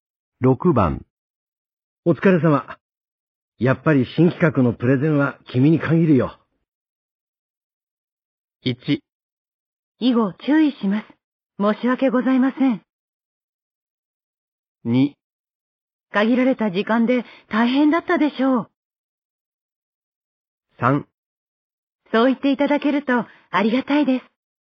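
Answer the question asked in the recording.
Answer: 3: そう言っていただけるとありがたいです。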